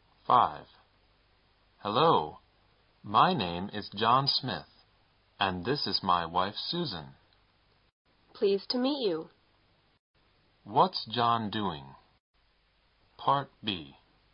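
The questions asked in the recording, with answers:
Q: What's John doing?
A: Introducing himself and his wife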